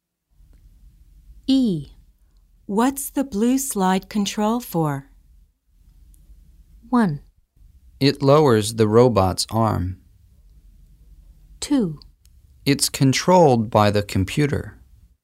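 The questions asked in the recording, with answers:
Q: What's the blue slide control for?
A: 1: It lowers the robot's arm.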